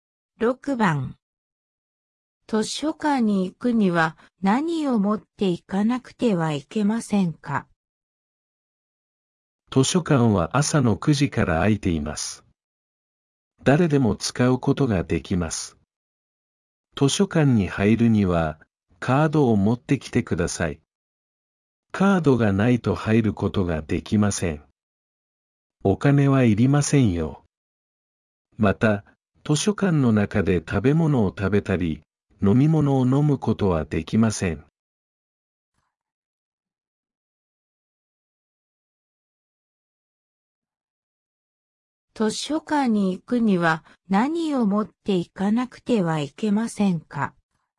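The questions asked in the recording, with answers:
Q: 図書館に行くには何を持って行かなくてはいけませんか?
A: カード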